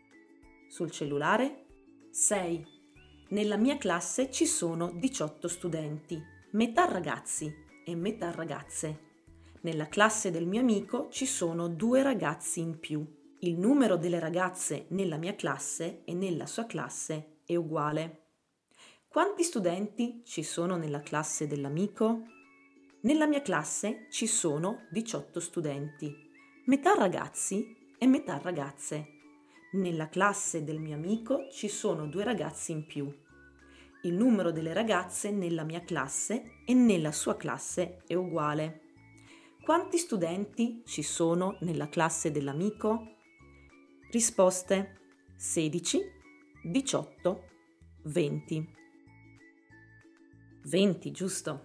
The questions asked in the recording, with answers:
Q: Quanti studenti ci sono nella classe dell'amico?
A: 20, giusto.